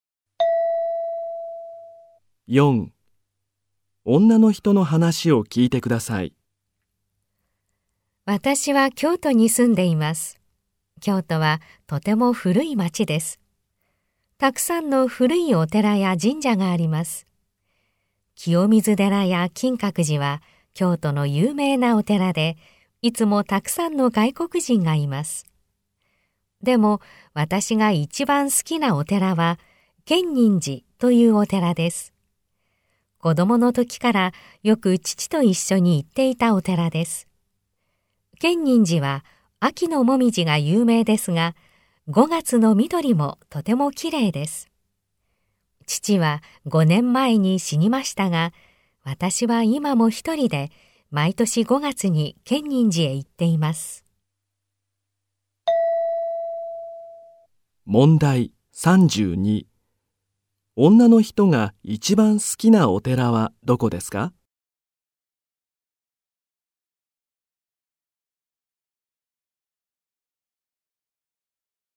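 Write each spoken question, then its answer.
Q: 女の人が一番好きなお寺はどこですか?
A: 建仁寺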